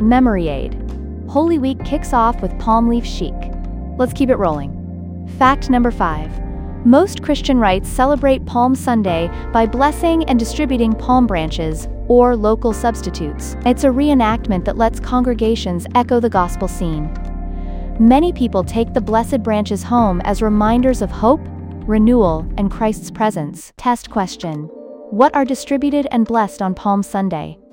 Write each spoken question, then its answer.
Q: What are distributed and blessed on Palm Sunday?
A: Palm branches.